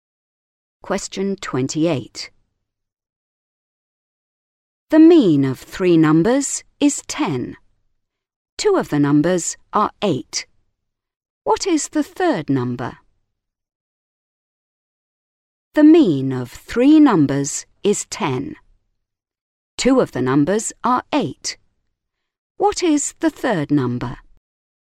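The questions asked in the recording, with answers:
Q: What is the third number?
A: 14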